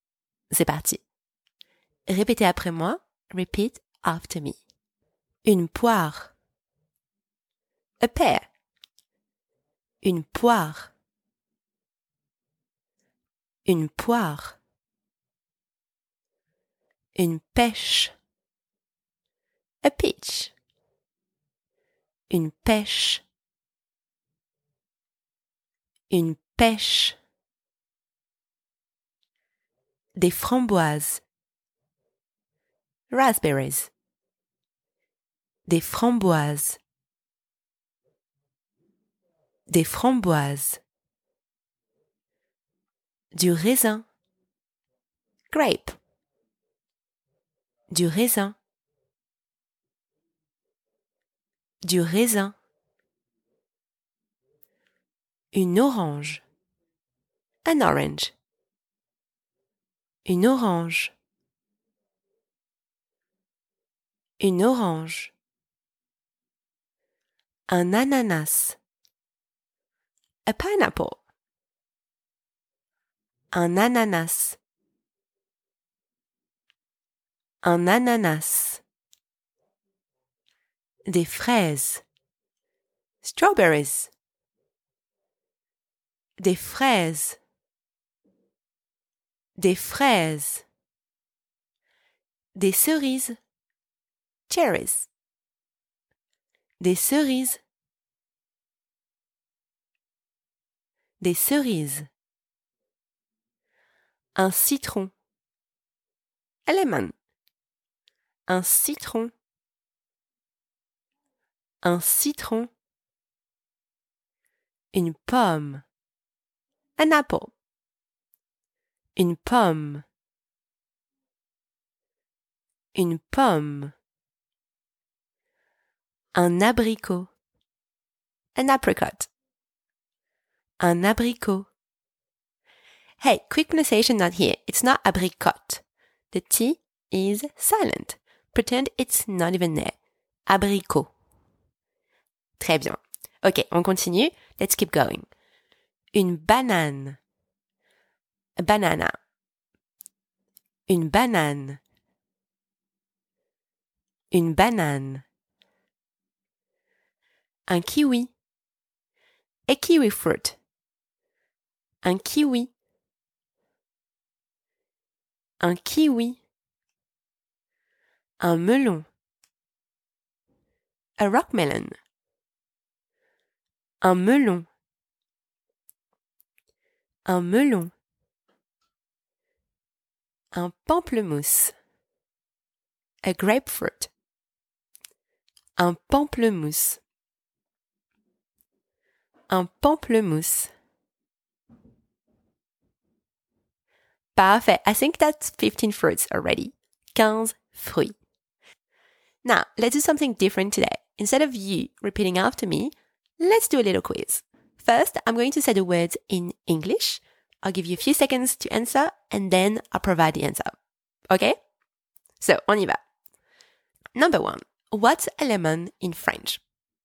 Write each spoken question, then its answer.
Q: what's a lemon in French?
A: Un citron.